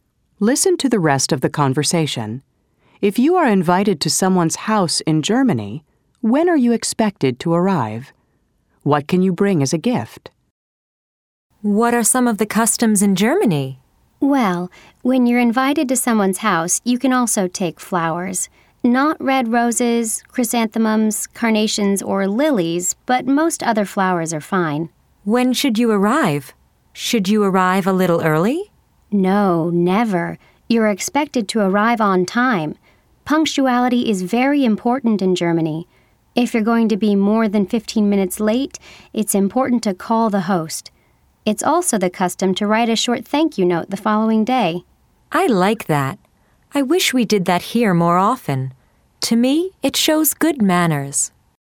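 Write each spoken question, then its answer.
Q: If you are invited to someone's house in Germany, when are you expected to arrive?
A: On time (never early)

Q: What can you bring as a gift?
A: Flowers (but not red roses, chrysanthemums, carnations or lilies)

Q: What are some of the customs in Germany?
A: Being on time; calling the host if you'll be more than 15 minutes late; writing a short thank-you note the next day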